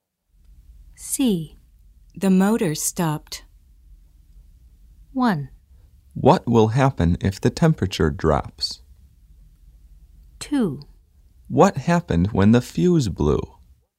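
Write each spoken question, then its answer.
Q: The motor stopped.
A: 2: What happened when the fuse blew?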